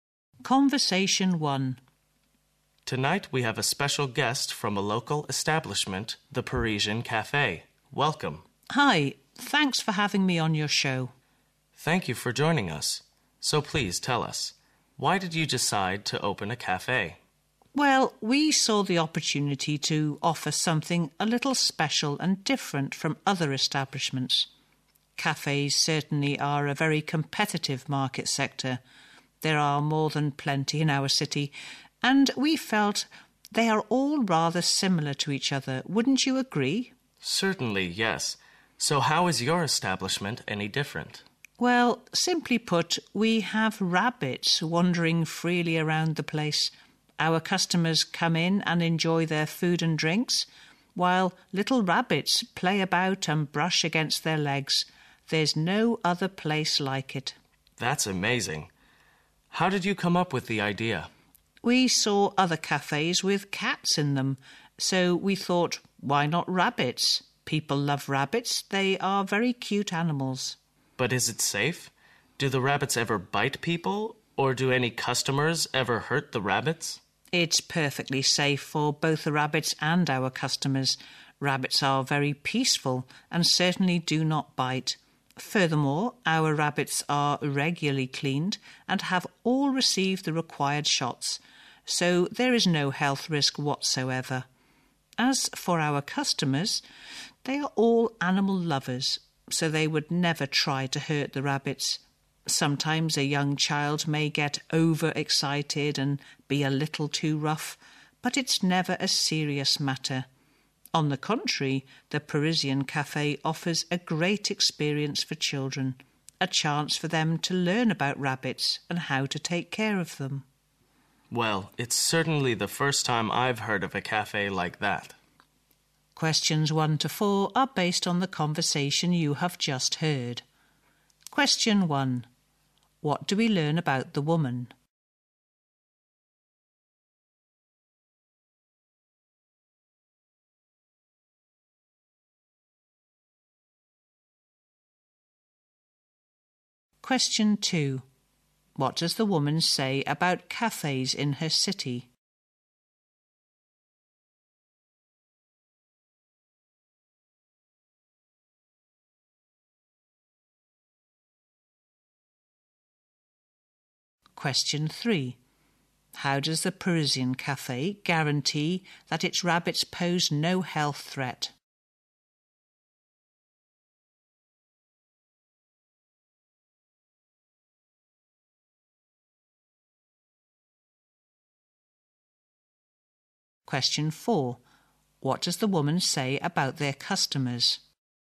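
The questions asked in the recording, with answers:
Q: What does the woman say about cafes in her city?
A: There are plenty and they are all rather similar

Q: How does the Parisian Café guarantee that its rabbits pose no health threat?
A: The rabbits are regularly cleaned and have received the required shots

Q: What does the woman say about their customers?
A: They are all animal lovers who would never hurt the rabbits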